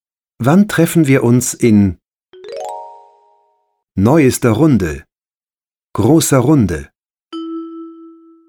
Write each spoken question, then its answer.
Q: Wann treffen wir uns in neuester Runde, großer Runde?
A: Wann treffen wir uns in großer Runde?